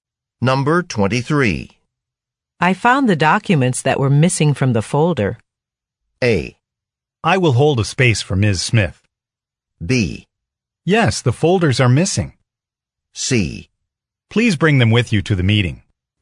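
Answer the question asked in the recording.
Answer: C: Please bring them with you to the meeting.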